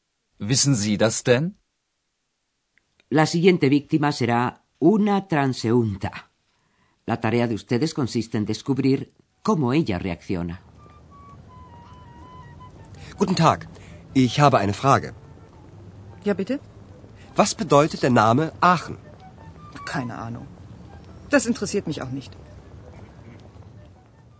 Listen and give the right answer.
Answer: La transeúnta asegura que no tiene ni la menor idea.